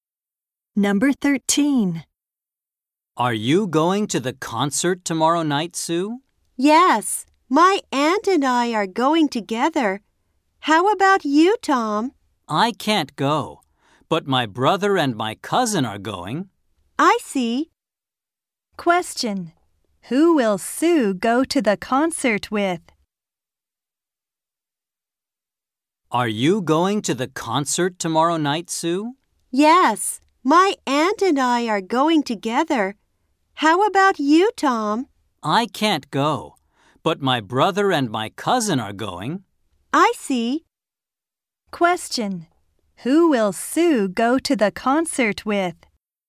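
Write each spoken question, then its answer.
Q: Who will Sue go to the concert with?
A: Her aunt.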